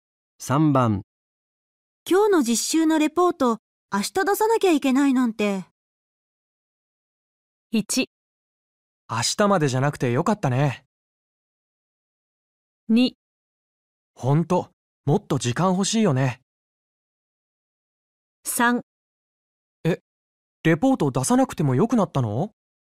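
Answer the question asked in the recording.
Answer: 2: ほんともっと時間欲しいよね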